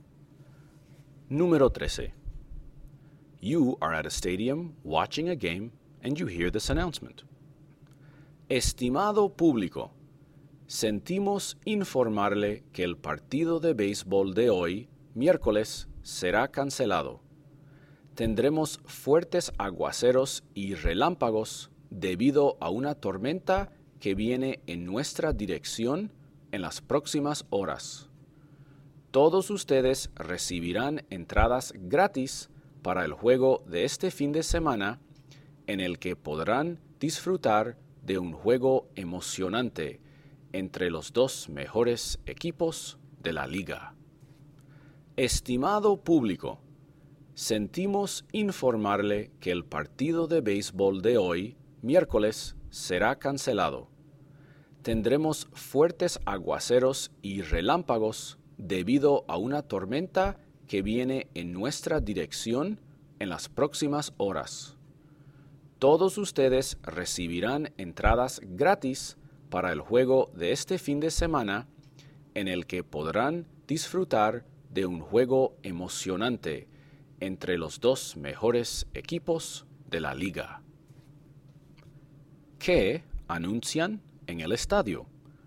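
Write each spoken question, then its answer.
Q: ¿Qué anuncian en el estadio?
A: Que el partido de béisbol de hoy se cancela por una tormenta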